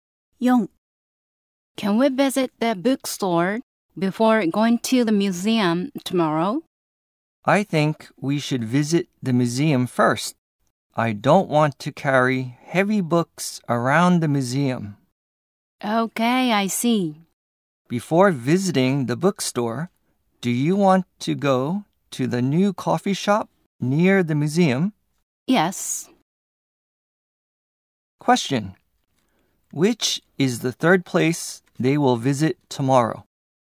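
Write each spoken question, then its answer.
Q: Question. Which is the third place they will visit tomorrow?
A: The bookstore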